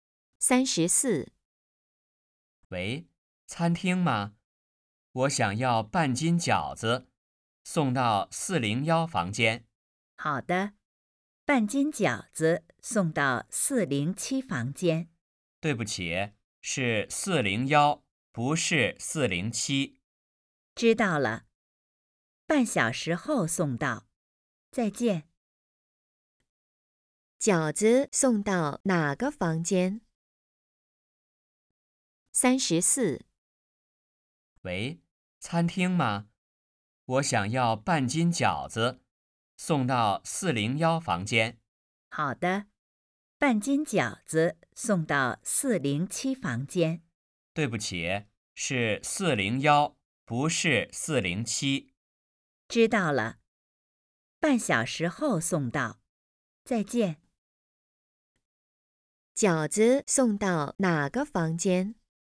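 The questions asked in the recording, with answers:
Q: 饺子送到哪个房间?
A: 401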